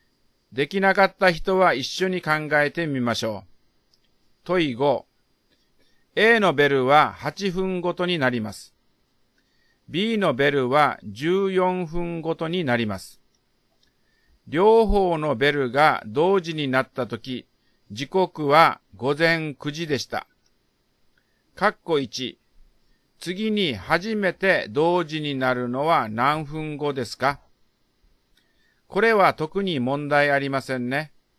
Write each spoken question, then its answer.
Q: 括弧1。次に初めて同時になるのは何分後ですか?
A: だから、括弧1の答えは56分後です。